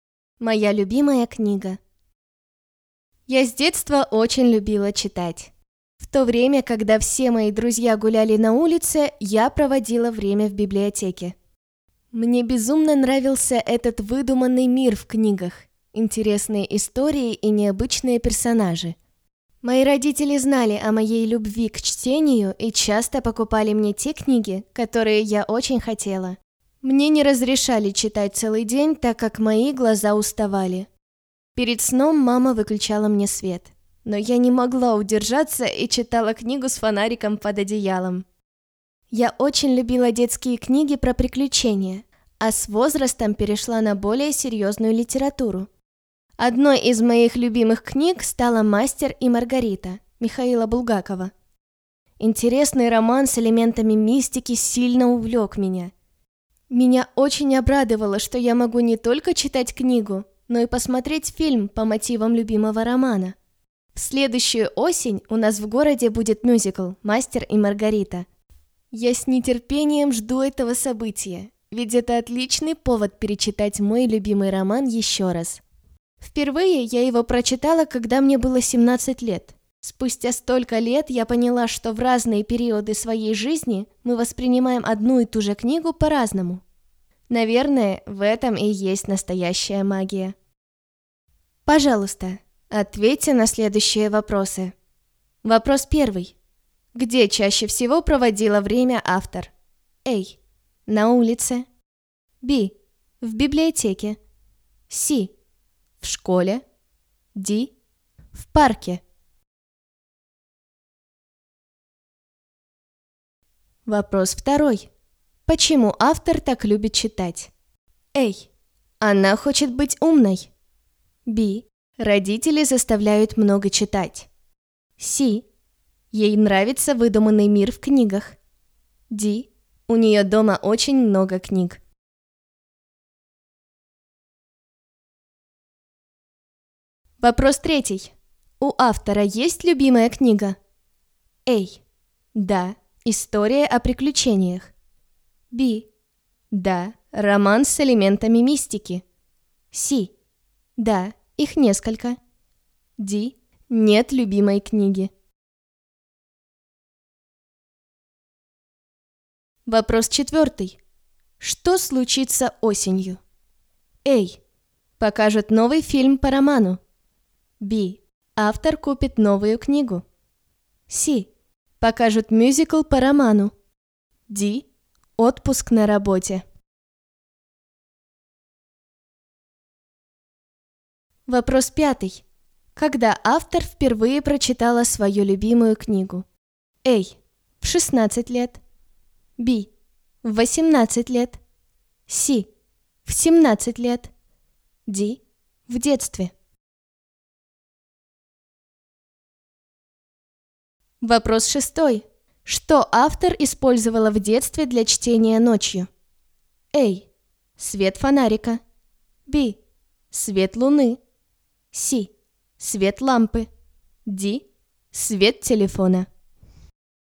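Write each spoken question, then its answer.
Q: Где чаще всего проводила время автор?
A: B: В библиотеке.

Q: Почему автор так любит читать?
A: C: Ей нравится выдуманный мир в книгах.

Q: У автора есть любимая книга?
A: B: Да, роман с элементами мистики.

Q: Что случится осенью?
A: C: Покажут мюзикл по роману.

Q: Когда автор впервые прочитала свою любимую книгу?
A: C: В 17 лет.

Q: Что автор использовала в детстве для чтения ночью?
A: A: Свет фонарика.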